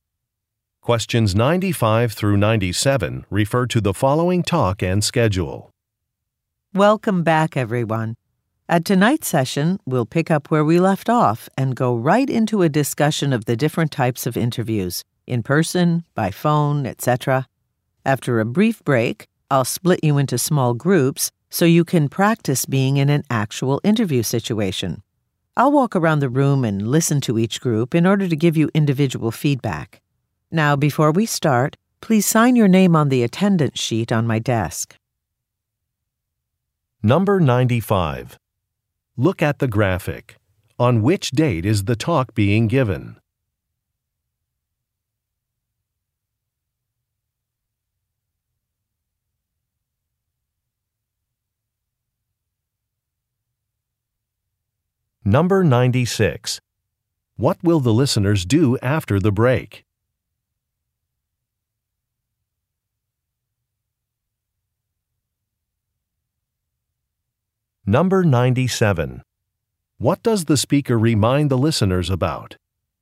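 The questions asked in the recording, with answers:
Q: What will the listeners do after the break?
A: Practice interviews in small groups

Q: What does the speaker remind the listeners about?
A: To sign the attendance sheet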